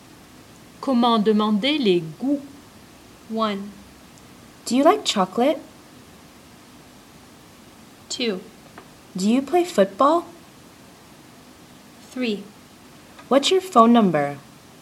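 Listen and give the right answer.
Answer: 1: Do you like chocolate?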